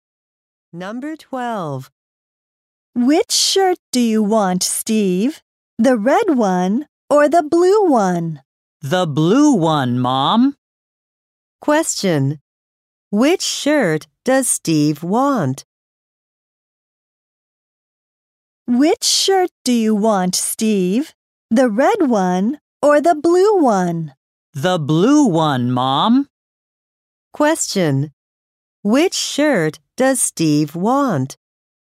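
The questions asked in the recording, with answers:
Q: Which shirt does Steve want?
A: The blue one.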